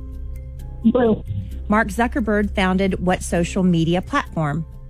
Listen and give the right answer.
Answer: Mark Zuckerberg founded Facebook, correct.